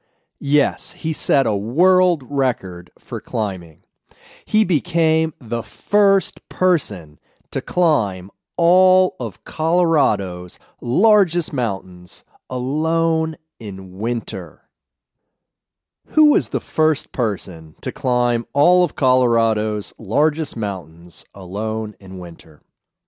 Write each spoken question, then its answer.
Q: Who was the first person to climb all of Colorado's largest mountains alone in winter?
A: Aaron was the first person to climb all of Colorado's largest mountains alone in winter.